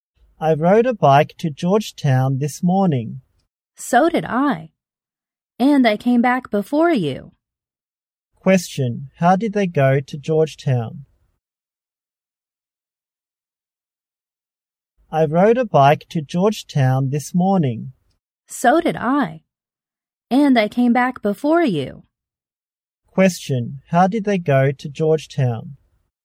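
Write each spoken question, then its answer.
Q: How did they go to Georgetown?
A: By bike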